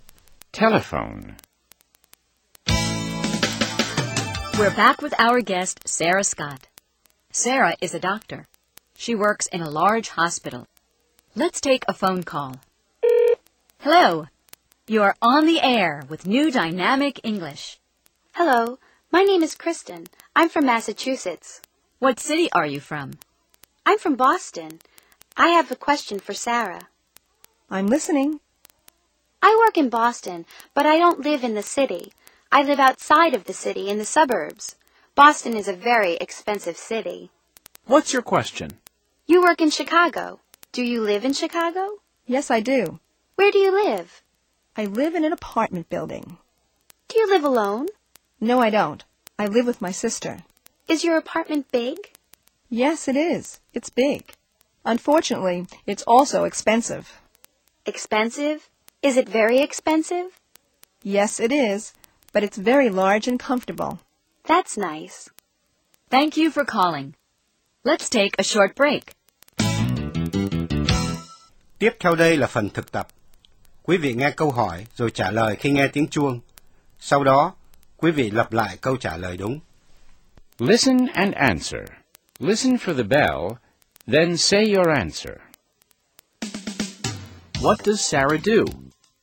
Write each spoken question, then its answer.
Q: What does Sarah do?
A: She's a doctor.